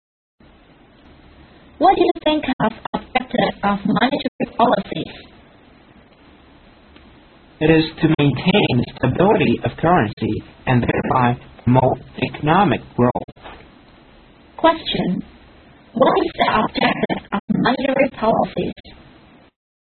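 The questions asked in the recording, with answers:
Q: What is the objective of monetary policies?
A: To maintain the stability of currency and thereby promote economic growth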